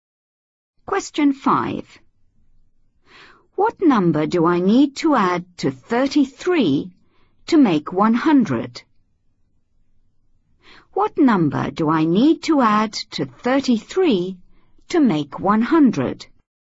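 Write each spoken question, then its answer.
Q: What number do I need to add to 33 to make 100?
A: 67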